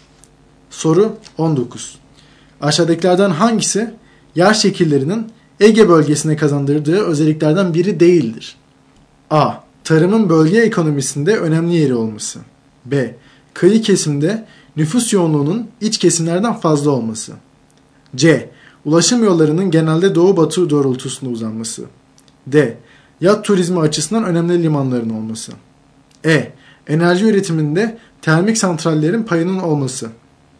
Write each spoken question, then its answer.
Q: Aşağıdakilerden hangisi yer şekillerinin Ege bölgesine kazandırdığı özelliklerden biri değildir?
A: Doğru yanıt E şıkkı.